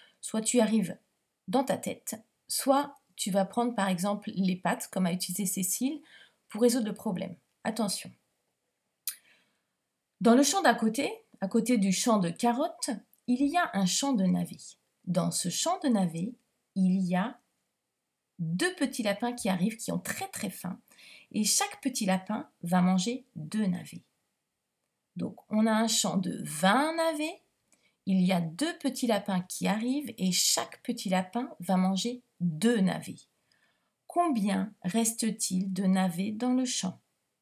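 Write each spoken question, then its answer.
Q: Combien reste-t-il de navets dans le champ?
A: 16 navets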